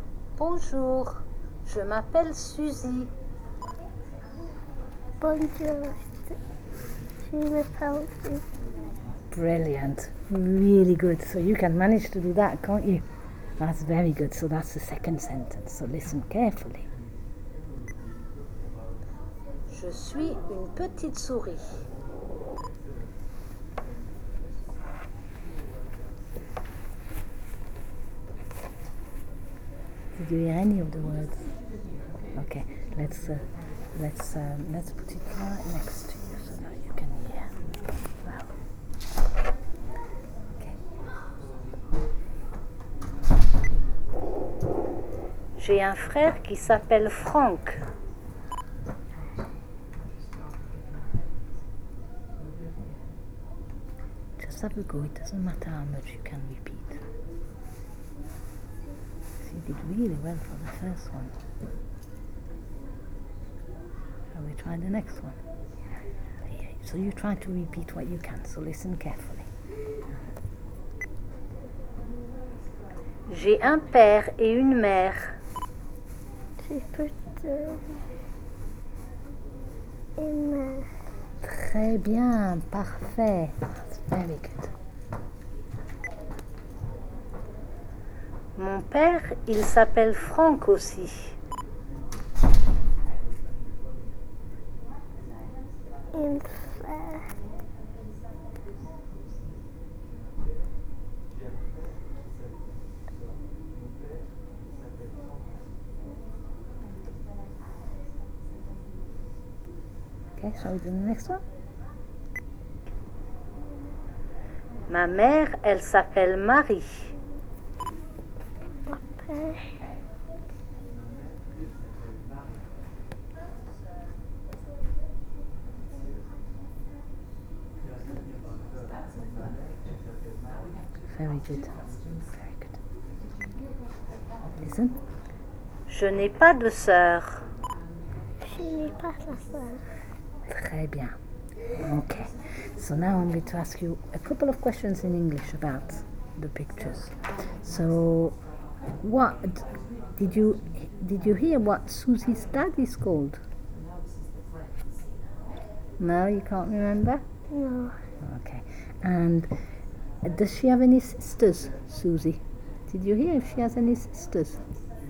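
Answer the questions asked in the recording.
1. Franck
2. No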